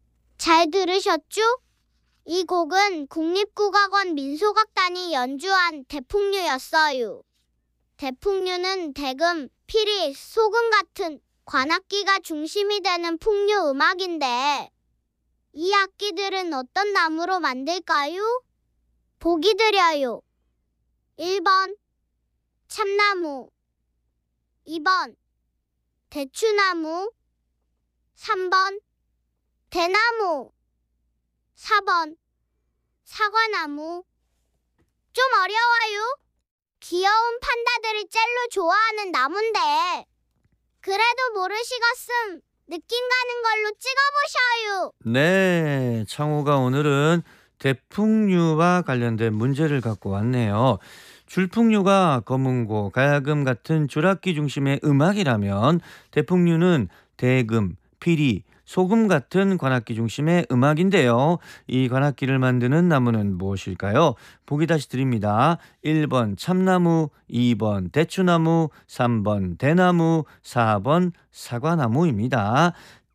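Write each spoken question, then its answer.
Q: 대풍류는 대금, 피리, 소금 같은 관악기가 중심이 되는 풍류 음악인데 이 악기들은 어떤 나무로 만들까요?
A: 3번: 대나무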